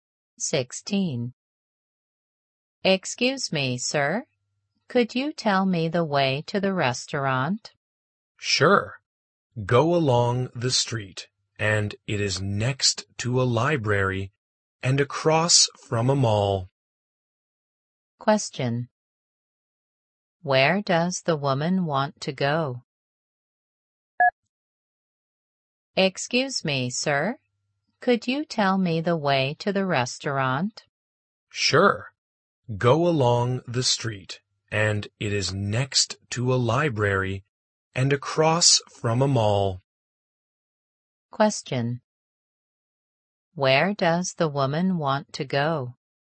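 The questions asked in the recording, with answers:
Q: Where does the woman want to go?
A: The restaurant.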